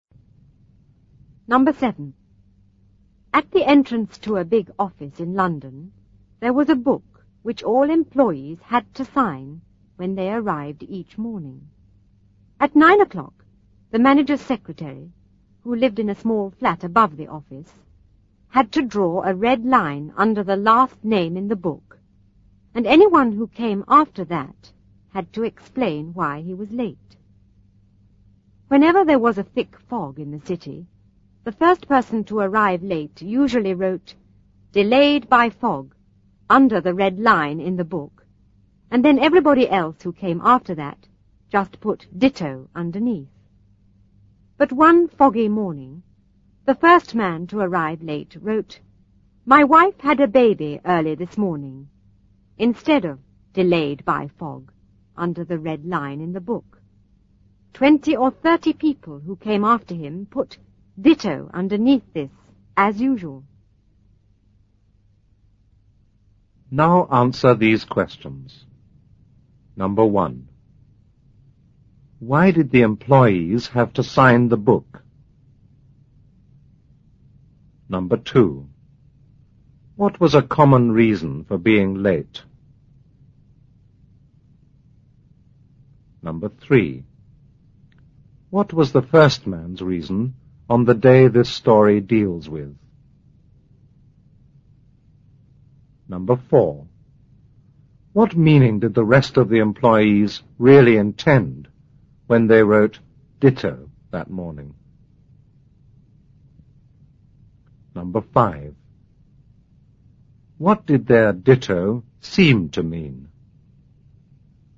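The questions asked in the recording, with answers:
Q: Why did the employees have to sign the book?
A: To show what time they arrived each morning

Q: What was a common reason for being late?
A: Thick fog

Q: What was the first man's reason on the day this story deals with?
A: His wife had a baby early that morning

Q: What meaning did the rest of the employees really intend when they wrote "ditto" that morning?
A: That they were delayed by fog

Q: What did their "ditto" seem to mean?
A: That their wives had also had babies that morning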